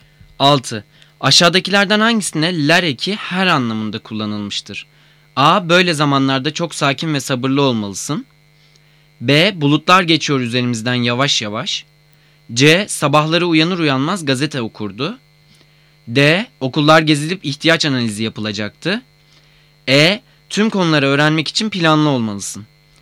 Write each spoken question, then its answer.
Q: Aşağıdakilerden hangisine ler eki her anlamında kullanılmıştır?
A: Cevap C. Sabahları uyanır uyanmaz gazete okurdu.